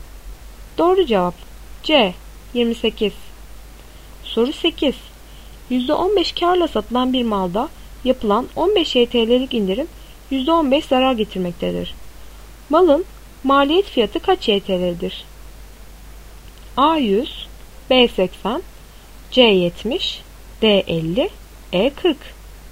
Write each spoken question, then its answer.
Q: Malın maliyet fiyatı kaç YTL'dir?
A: Doğru cevap D 50.